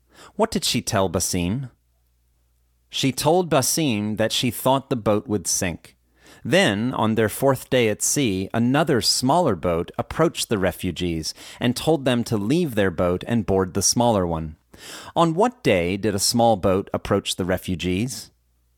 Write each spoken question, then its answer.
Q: On what day did a small boat approach the refugees?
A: On the fourth day at sea, a smaller boat approached the refugees.